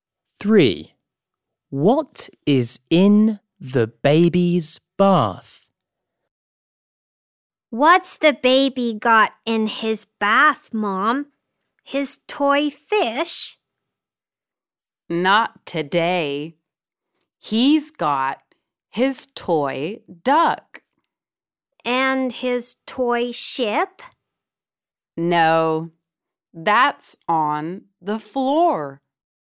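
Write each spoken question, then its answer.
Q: What is in the baby's bath?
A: His toy duck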